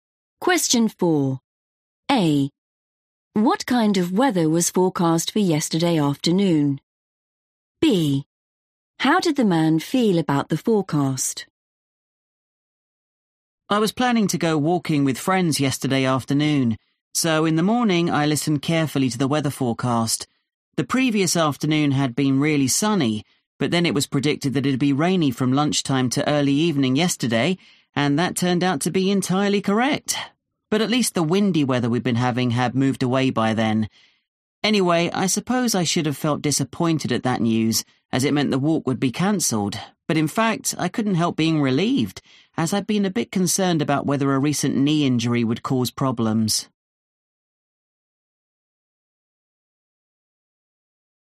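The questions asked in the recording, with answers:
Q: What kind of weather was forecast for yesterday afternoon?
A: rainy

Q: How did the man feel about the forecast?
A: relieved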